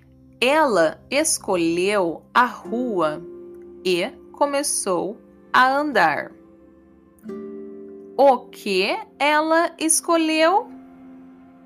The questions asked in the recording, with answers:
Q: O que ela escolheu?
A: A rua ela escolheu a rua.